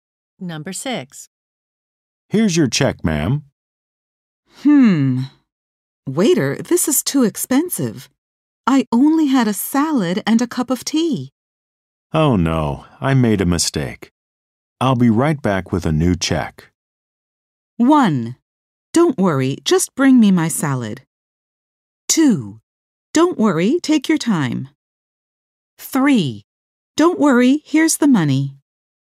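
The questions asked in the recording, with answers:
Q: Oh no, I made a mistake. I'll be right back with a new check.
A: 2: Don't worry, take your time.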